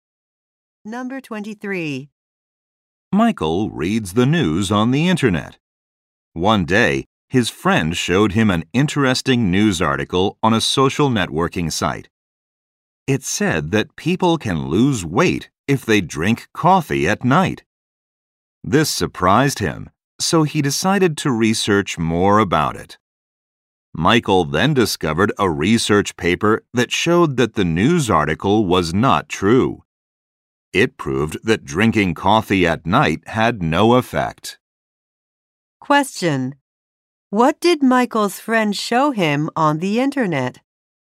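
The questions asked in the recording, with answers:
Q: What did Michael's friend show him on the internet?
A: An article saying drinking coffee at night helps you lose weight.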